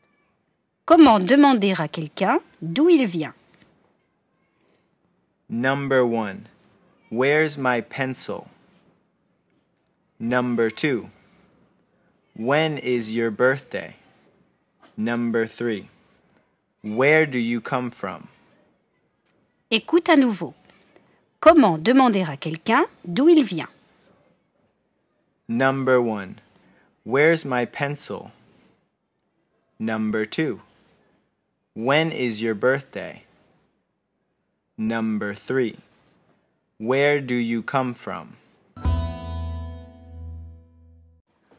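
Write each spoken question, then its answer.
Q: Comment demander à quelqu'un d'où il vient?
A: 3: Where do you come from?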